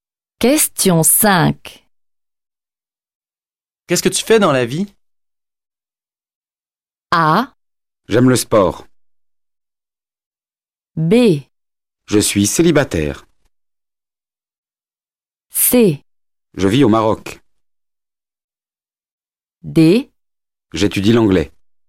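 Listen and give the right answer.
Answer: D: J'étudie l'anglais.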